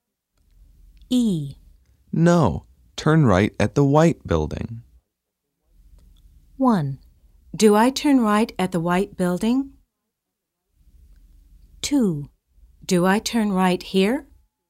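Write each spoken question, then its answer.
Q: No, turn right at the white building.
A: 2: Do I turn right here?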